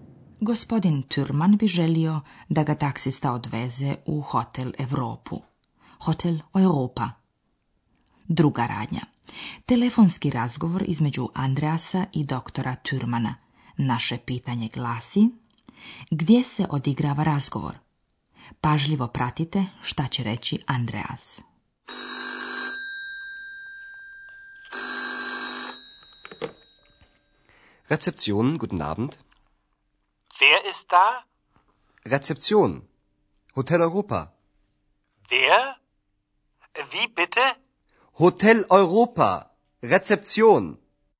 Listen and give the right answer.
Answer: Andreas se prijavljuje na recepciji.